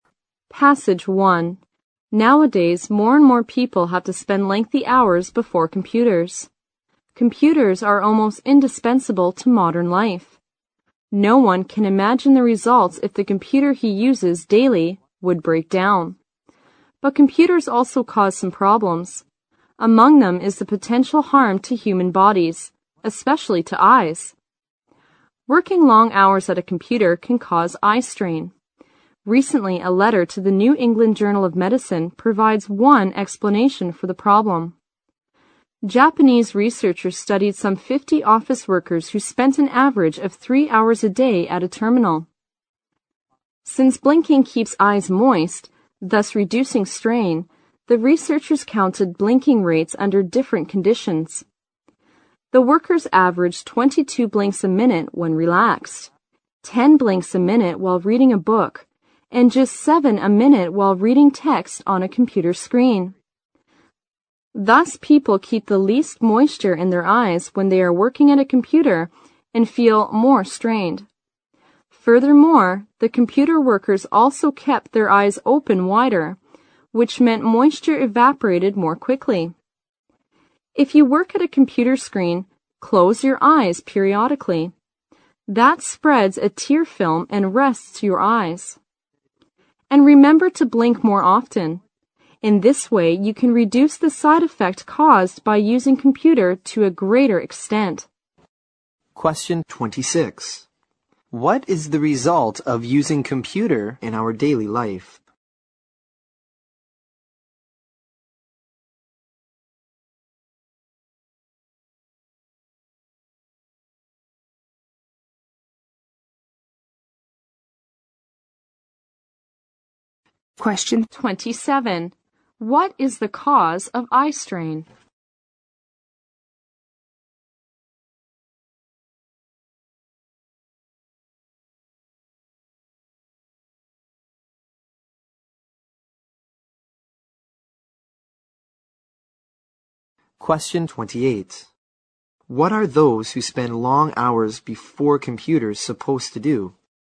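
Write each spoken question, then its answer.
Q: What is the cause of eye strain?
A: People blink less at a computer, so their eyes keep less moisture

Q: What are those who spend long hours before computers supposed to do?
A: Close their eyes from time to time and blink more often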